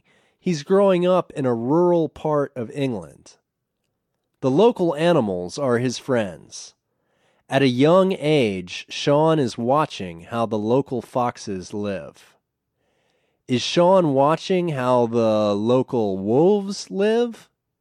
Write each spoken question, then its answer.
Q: Is Sean watching how the local wolves live?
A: No, he's not watching how the local wolves live.